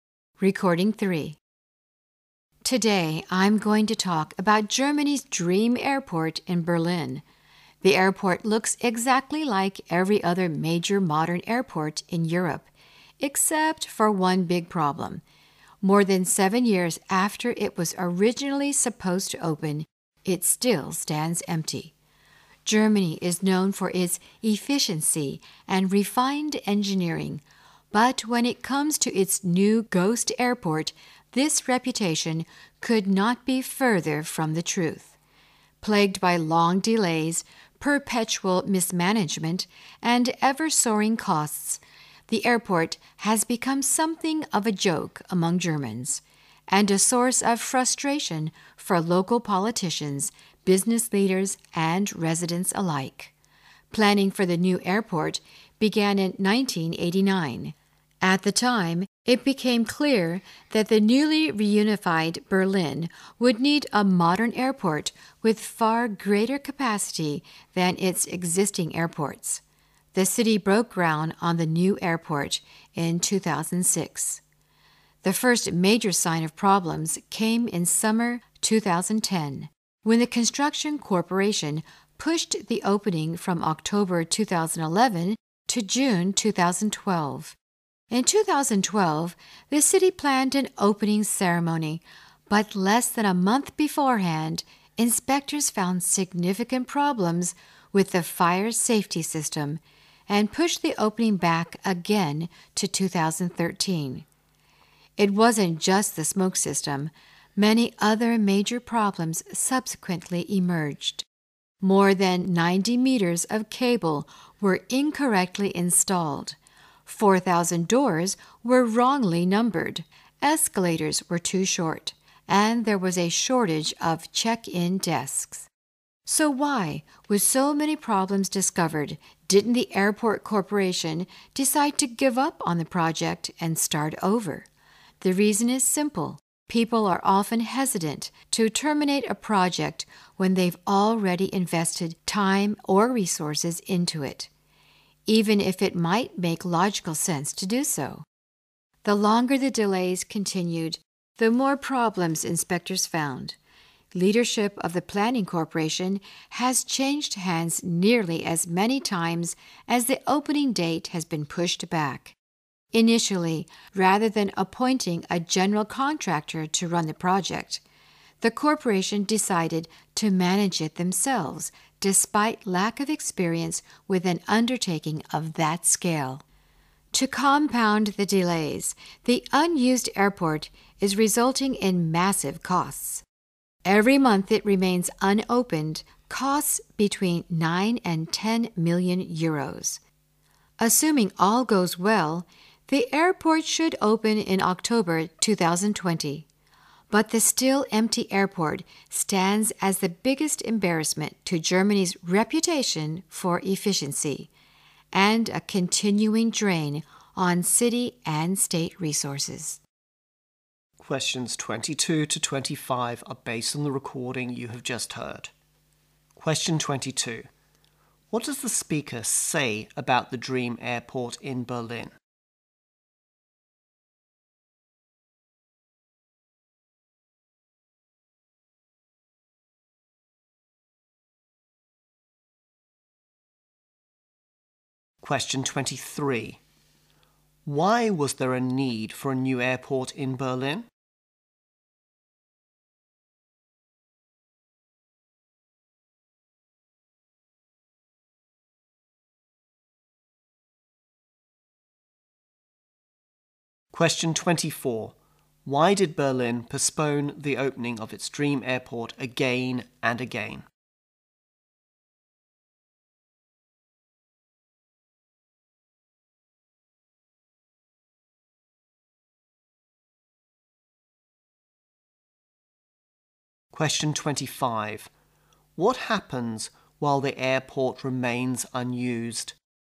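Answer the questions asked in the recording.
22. It still stands empty, more than seven years after it was supposed to open.
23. The newly reunified Berlin needed an airport with far greater capacity.
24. Inspectors kept finding problems, starting with the fire safety system.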